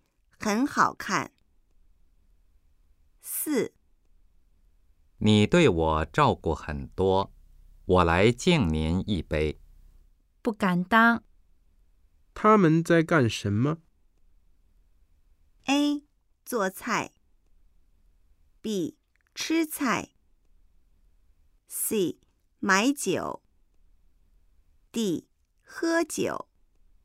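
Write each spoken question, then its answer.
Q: 他们在干什么?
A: D: 喝酒。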